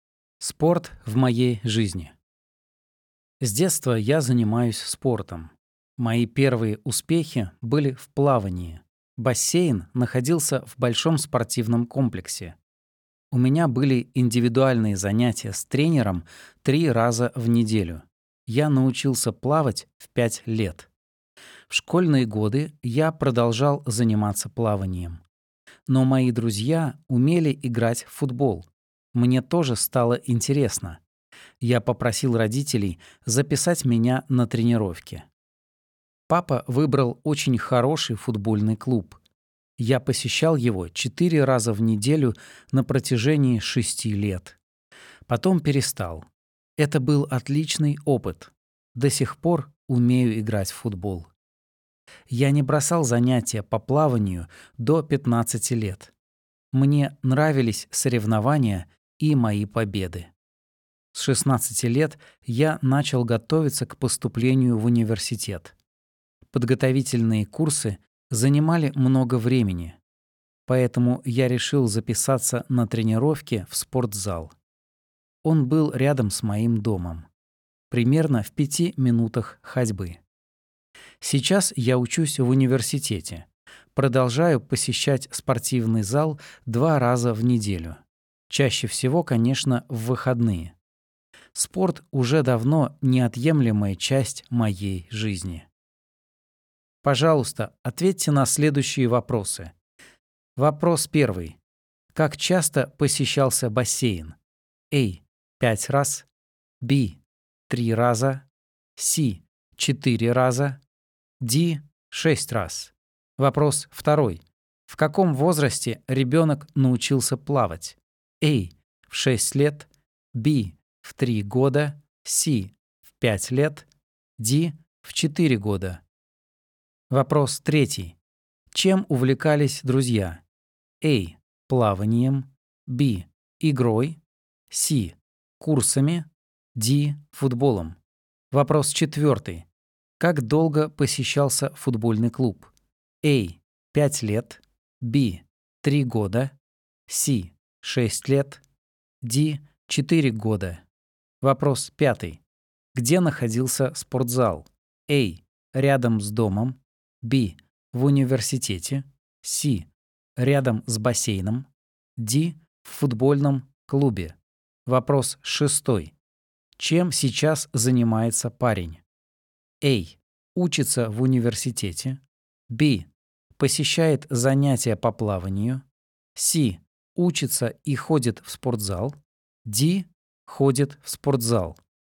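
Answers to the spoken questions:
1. B: 3 раза
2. C: В 5 лет
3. D: Футболом
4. C: 6 лет
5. A: Рядом с домом
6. C: Учится и ходит в спортзал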